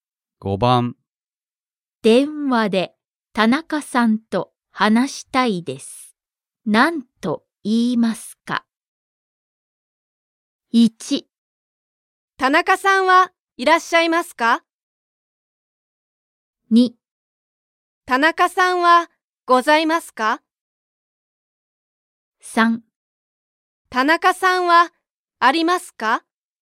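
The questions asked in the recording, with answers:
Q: 電話で田中さんと話したいです。何と言いますか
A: 1: 田中さんはいらっしゃいますか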